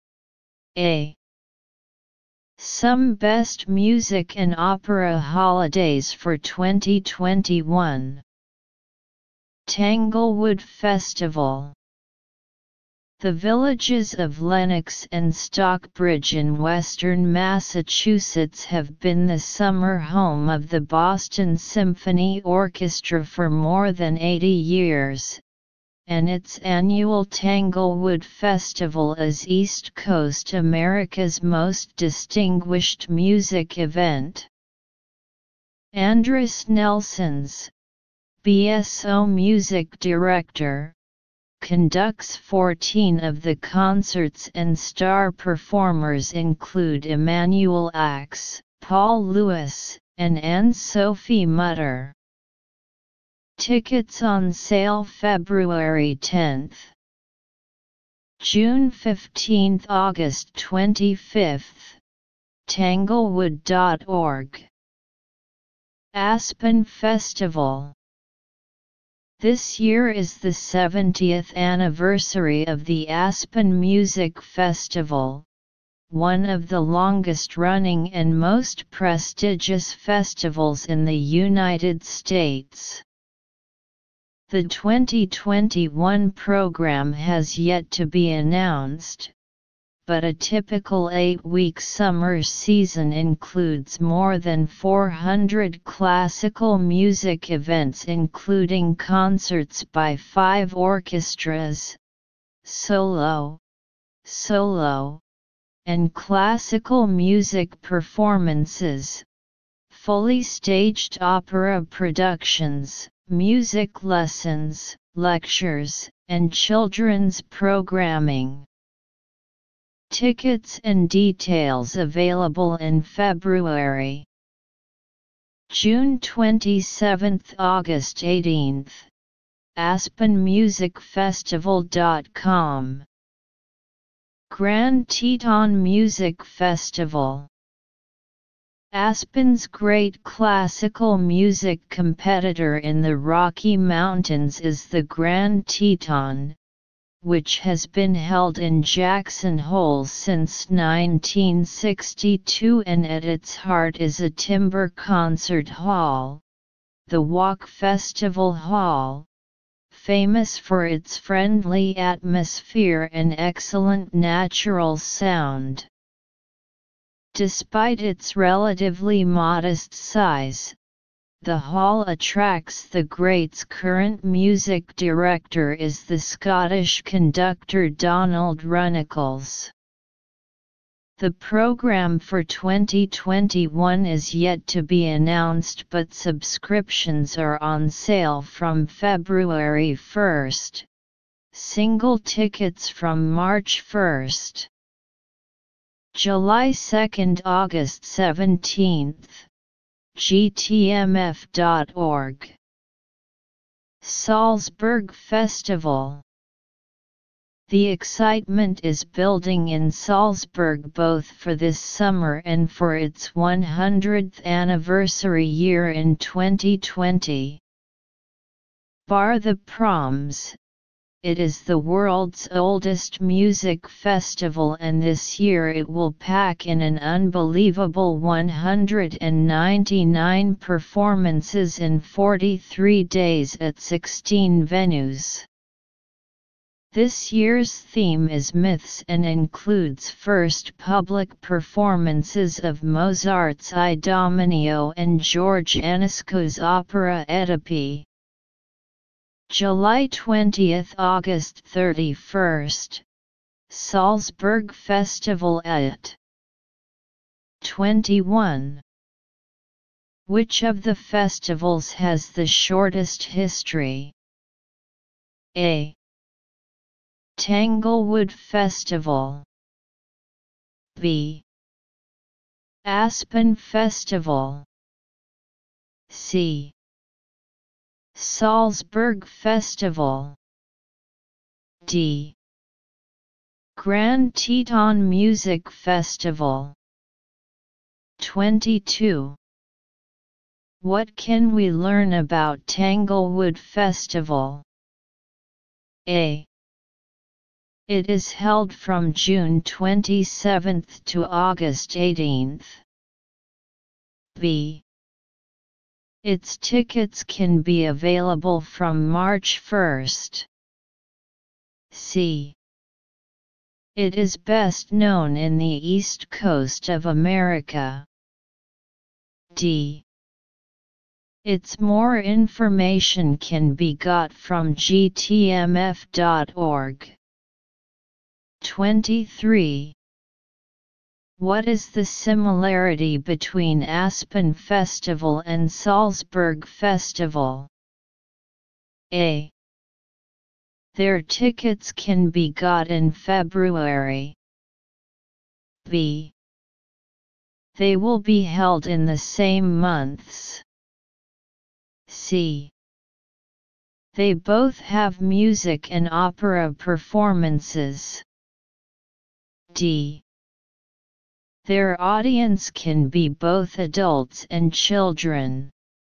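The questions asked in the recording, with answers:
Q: Which of the festivals has the shortest history?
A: D: Grand Teton Music Festival.

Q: What can we learn about Tanglewood Festival?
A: C: It is best known in the East Coast of America.

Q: What is the similarity between Aspen Festival and Salzburg Festival?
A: C: They both have music and opera performances.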